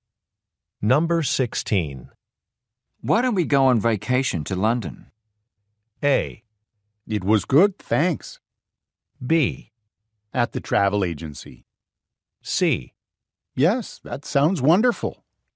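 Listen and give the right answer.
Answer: C: Yes, that sounds wonderful.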